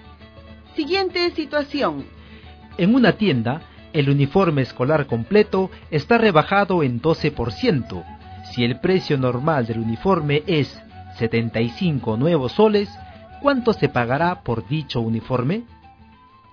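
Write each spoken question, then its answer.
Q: Si el precio normal del uniforme es 75 nuevos soles, ¿cuánto se pagará por dicho uniforme?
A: 66 nuevos soles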